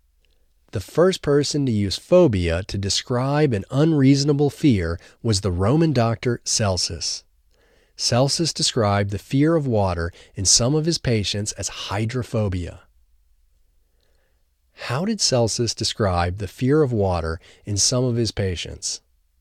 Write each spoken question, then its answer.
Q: How did Celsus describe the fear of water in some of his patients?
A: Celsus described the fear of water in some of his patients as hydrophobia.